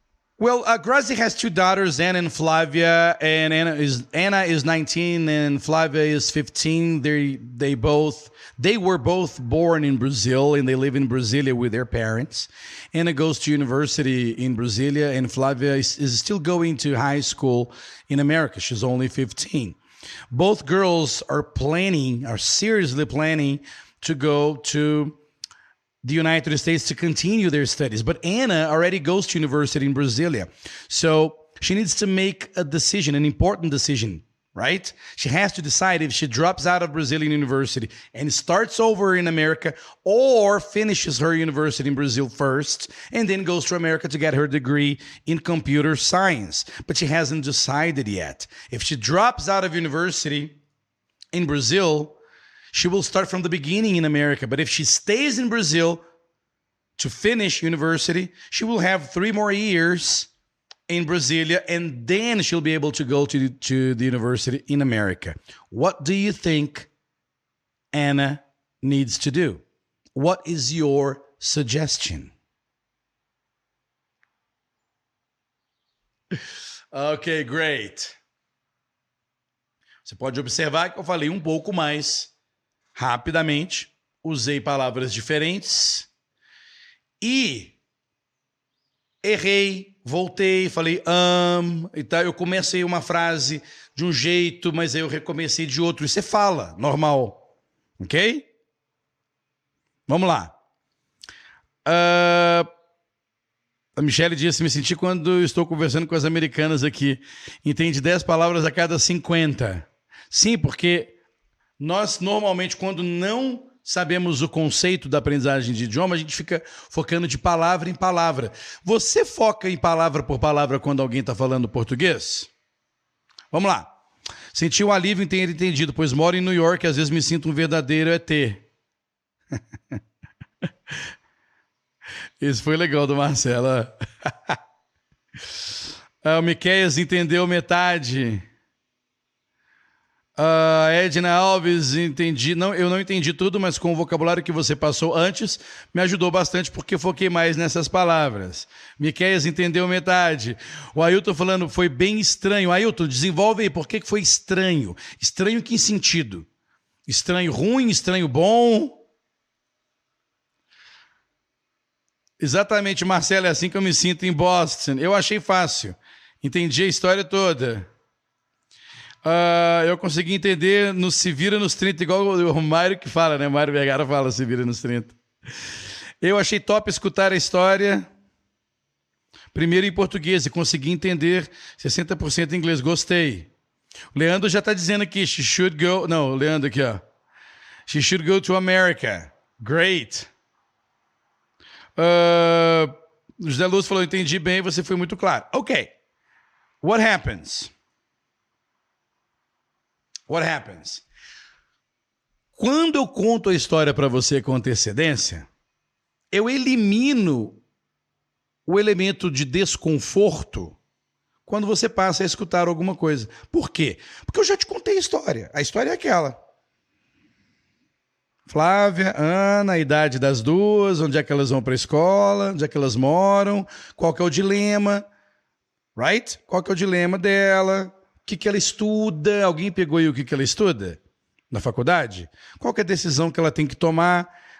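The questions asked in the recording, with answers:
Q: que, que ela estuda? Alguém pegou aí o que, que ela estuda na faculdade?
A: Ciência da computação

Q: Qual é a decisão que ela tem que tomar?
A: Se abandona a faculdade no Brasil e recomeça nos EUA, ou termina a faculdade no Brasil (mais três anos) e depois vai para os EUA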